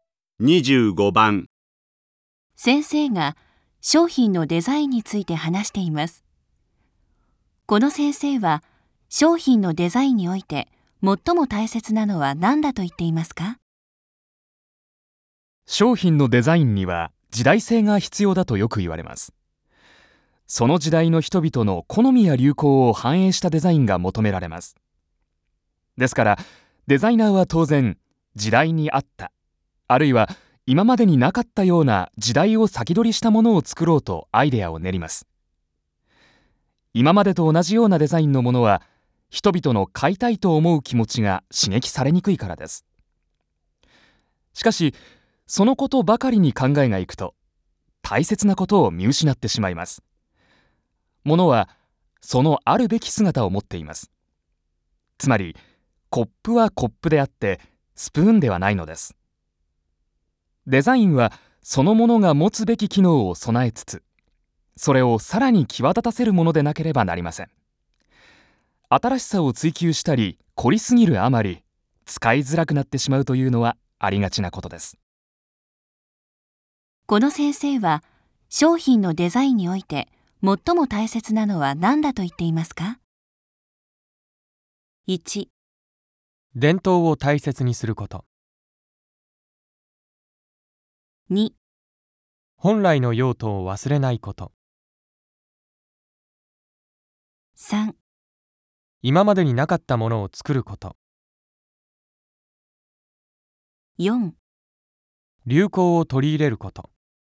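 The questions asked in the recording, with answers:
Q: この先生は商品のデザインにおいて最も大切なのは何だと言っていますか?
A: 2: 本来の用途を忘れないこと。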